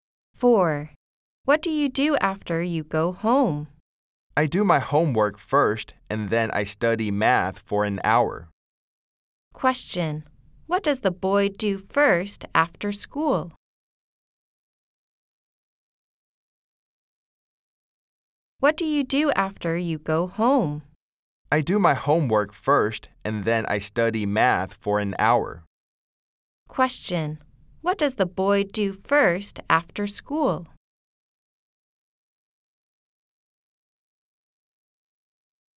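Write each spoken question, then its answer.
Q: What does the boy do first after school?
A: He does his homework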